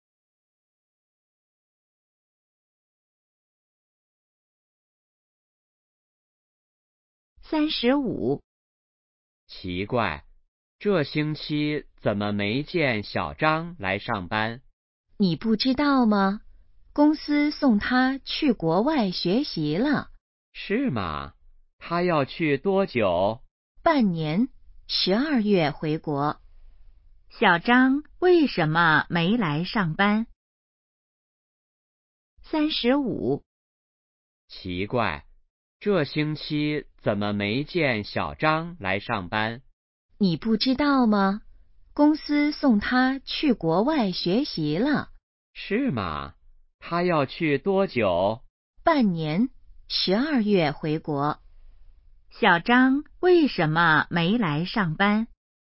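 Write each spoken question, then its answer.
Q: 小张为什么没来上班?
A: 公司送他去国外学习了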